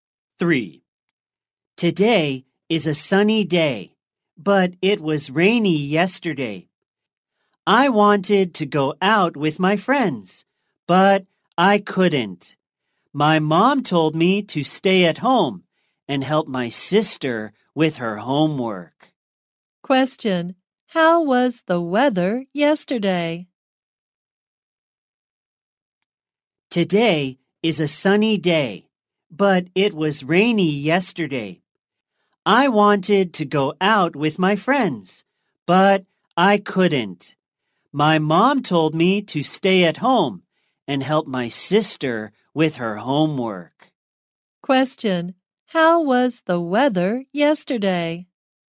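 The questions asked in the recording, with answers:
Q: Question: How was the weather yesterday?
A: Rainy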